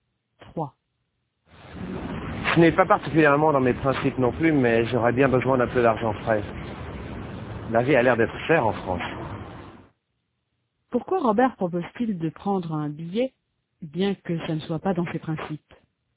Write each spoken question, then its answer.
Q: Pourquoi Robert propose-t-il de prendre un billet, bien que ça ne soit pas dans ses principes?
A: Parce qu'il a besoin d'un peu d'argent frais.